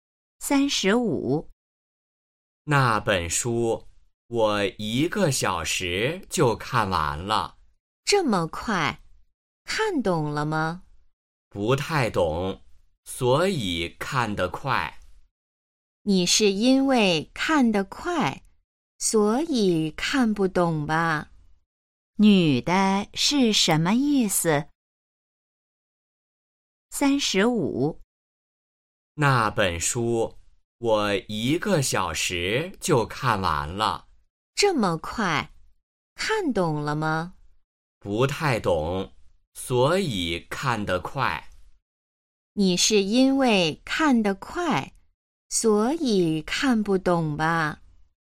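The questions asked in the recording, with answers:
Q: 女的是什么意思?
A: 男的看得太快,所以没看懂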